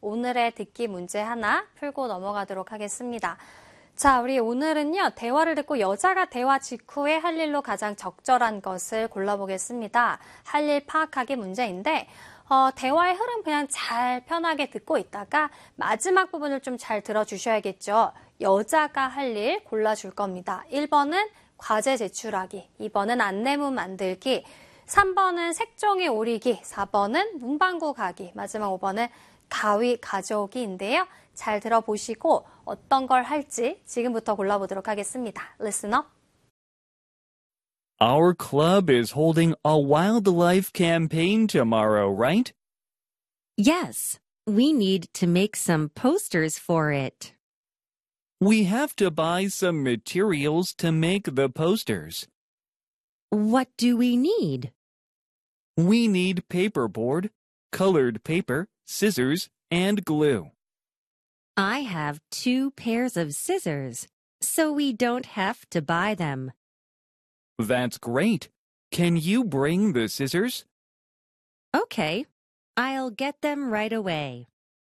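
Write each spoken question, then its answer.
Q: 대화를 듣고 여자가 대화 직후에 할 일로 가장 적절한 것을 골라보겠습니다.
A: 5: 가위 가져오기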